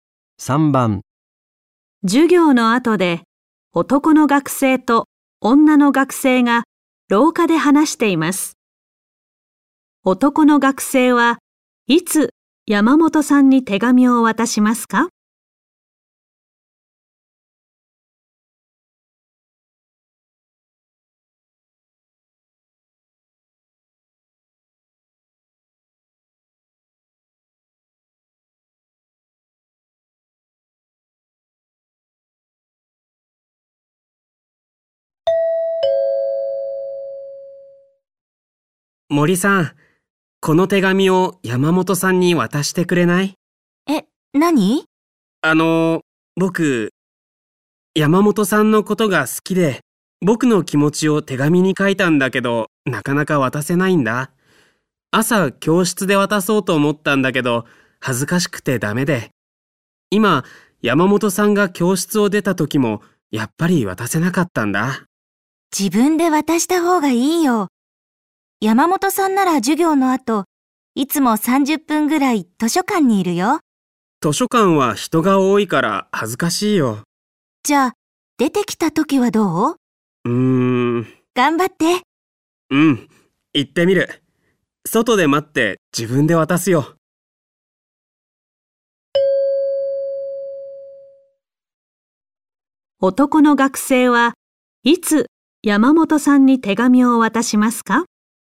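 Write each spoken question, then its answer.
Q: 男の学生はいつ山本さんに手紙を渡しますか?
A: 山本さんが図書館から出てきた時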